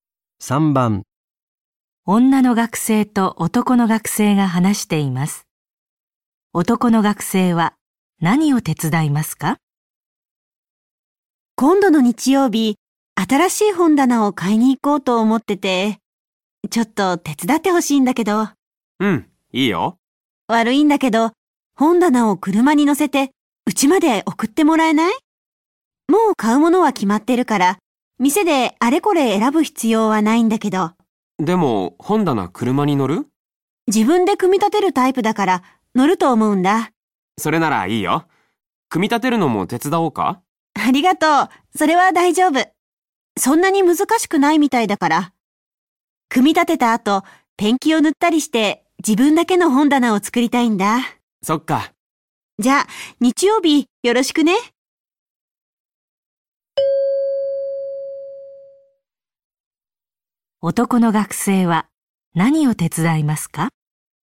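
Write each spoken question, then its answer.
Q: 男の学生は、何を手伝いますか?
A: 本棚を車に乗せて家まで運ぶこと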